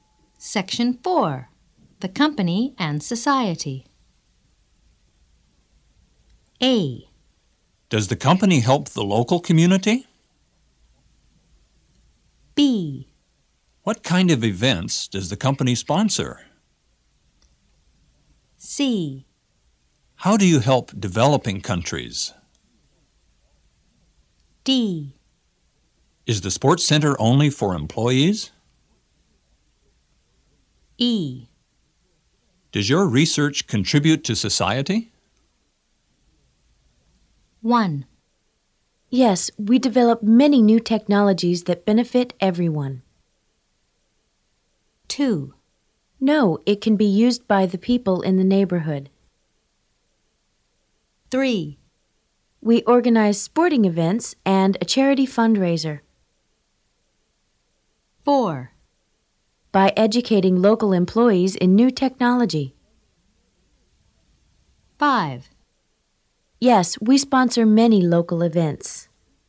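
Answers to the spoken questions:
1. E: Does your research contribute to society?
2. D: Is the sports center only for employees?
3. B: What kind of events does the company sponsor?
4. C: How do you help developing countries?
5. A: Does the company help the local community?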